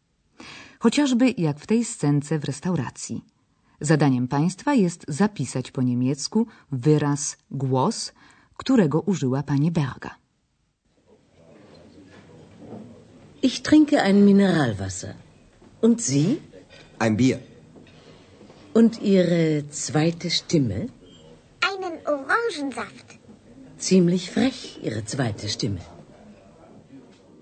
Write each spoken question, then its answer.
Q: Zadaniem państwa jest zapisać po niemiecku wyraz głos, którego użyła pani Berga.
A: wyraz sztymę, głos